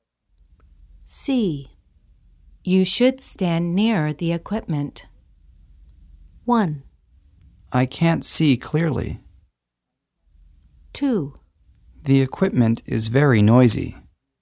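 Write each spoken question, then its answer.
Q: You should stand near the equipment.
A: 1: I can't see clearly.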